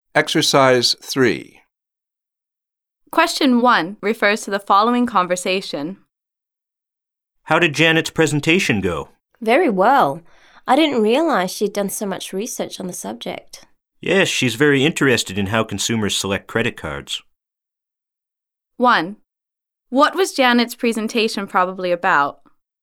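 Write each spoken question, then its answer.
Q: What was Janet's presentation probably about?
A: How consumers select credit cards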